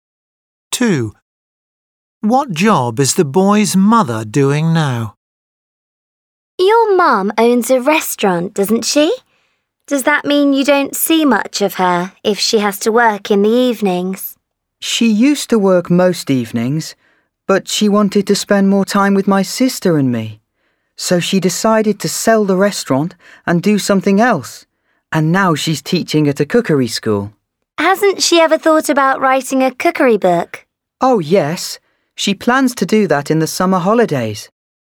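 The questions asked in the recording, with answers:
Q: What job is the boy's mother doing now?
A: teaching at a cookery school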